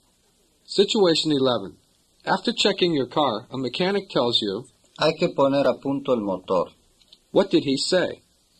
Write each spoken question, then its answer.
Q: What did he say?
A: He said, it is necessary to tune up the engine.